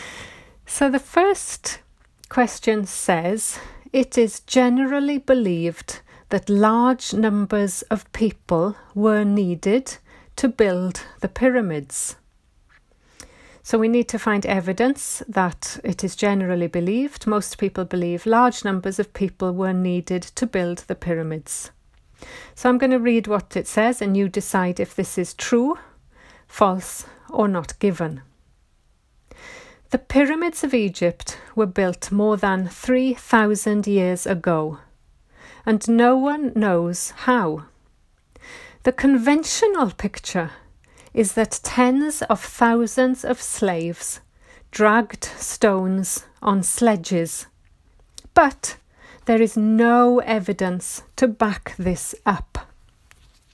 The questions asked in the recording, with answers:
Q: it is generally believed that large numbers of people were needed to build the pyramids.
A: So the answer is true.